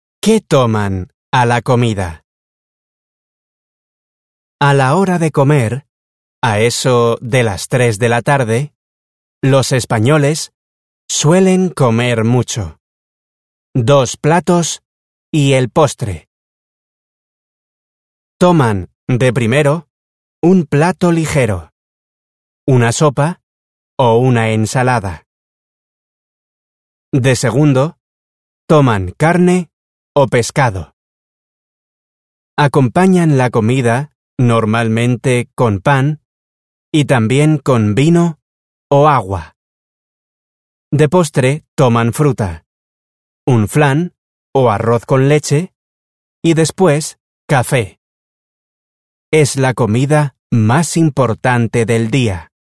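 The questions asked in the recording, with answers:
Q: ¿Qué toman a la comida?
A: Dos platos y postre: de primero sopa o ensalada, de segundo carne o pescado, con pan y vino o agua; de postre fruta, flan o arroz con leche, y café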